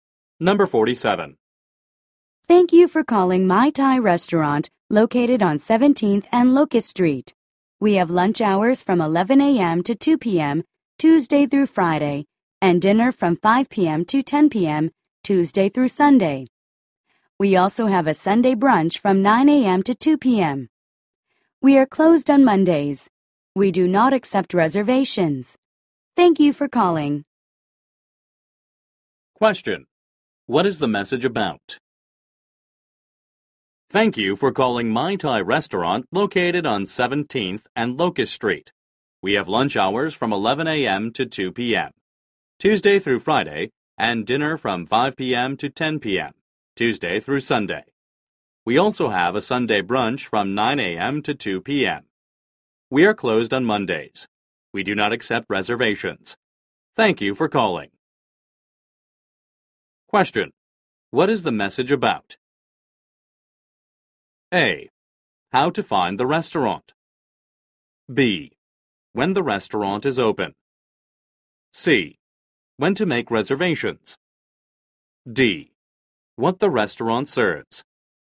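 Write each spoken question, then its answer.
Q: What is the message about?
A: B: When the restaurant is open.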